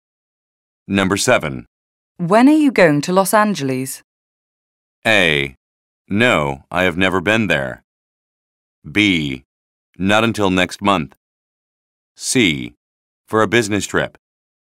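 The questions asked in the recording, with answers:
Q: When are you going to Los Angeles?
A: B: Not until next month.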